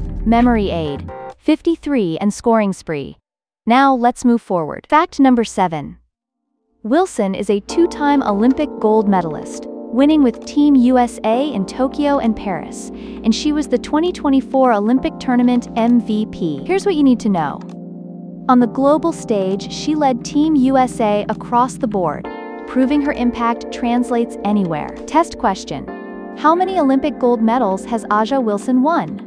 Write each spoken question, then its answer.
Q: How many Olympic gold medals has Ajaja Wilson won?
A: Correct answer, 2.